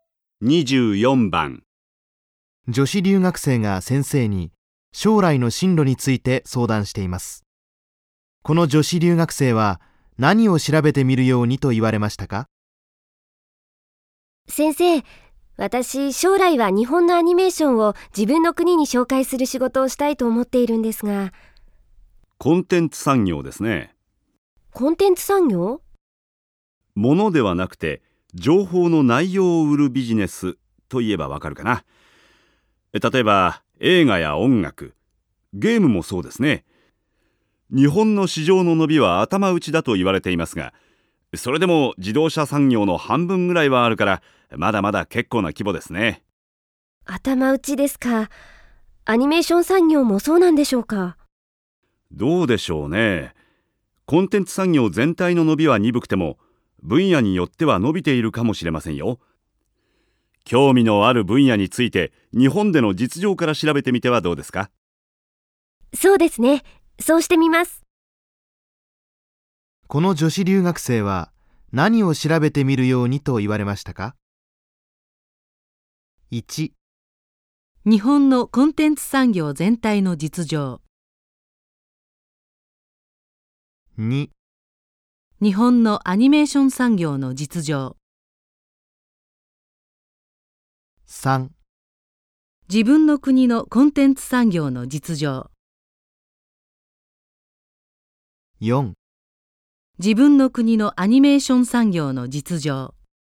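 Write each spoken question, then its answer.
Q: この女子留学生は何を調べてみるようにと言われましたか?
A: 2: 日本のアニメーション産業の実情。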